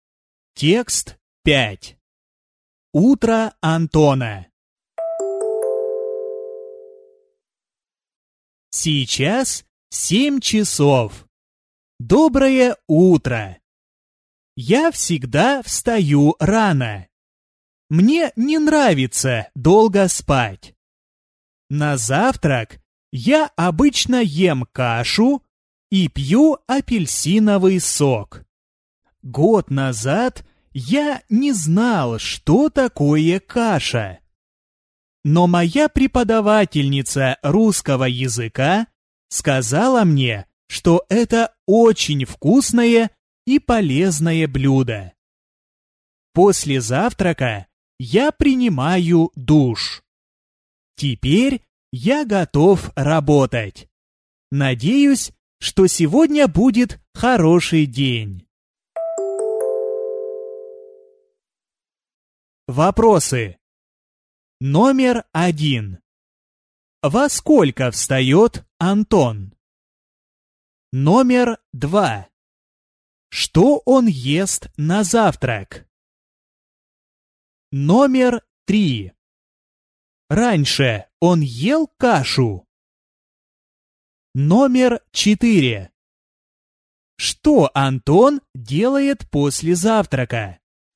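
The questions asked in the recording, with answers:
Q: Что он ест на завтрак?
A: Кашу

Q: Раньше он ел кашу?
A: Нет

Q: Что Антон делает после завтрака?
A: Принимает душ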